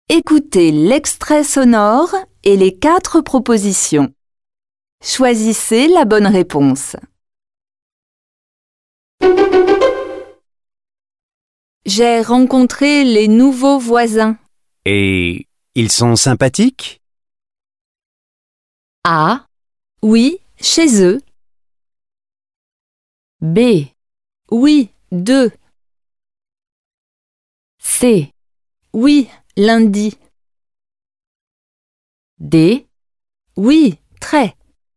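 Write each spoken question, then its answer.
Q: Et ils sont sympathiques?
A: D: Oui, très.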